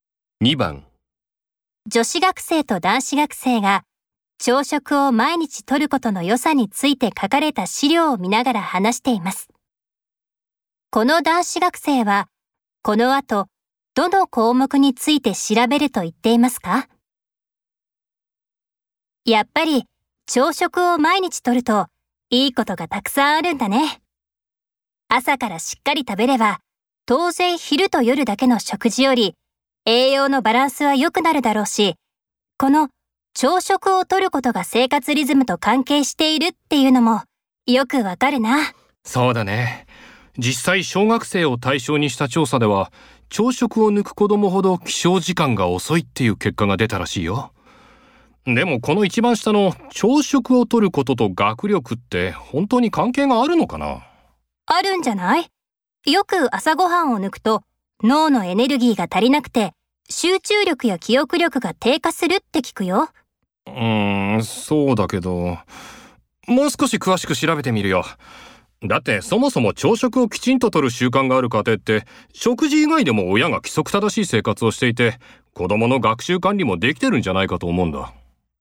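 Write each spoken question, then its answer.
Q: この男子学生はこの後どの項目について調べると言っていますか?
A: 朝食をとることと学力の関係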